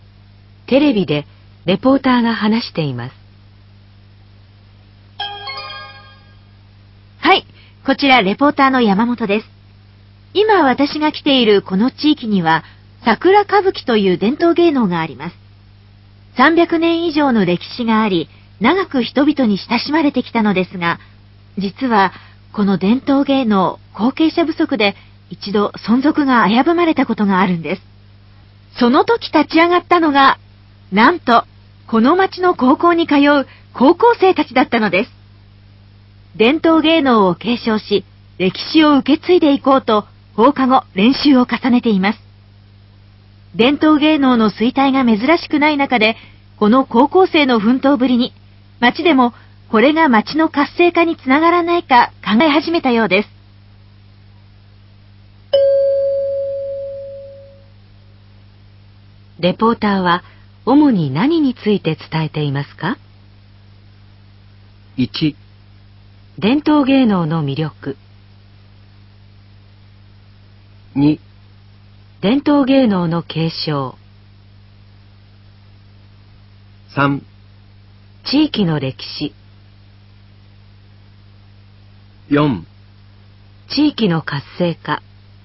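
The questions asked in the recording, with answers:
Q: レポーターは主に何について伝えていますか?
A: 2: 伝統芸能の継承。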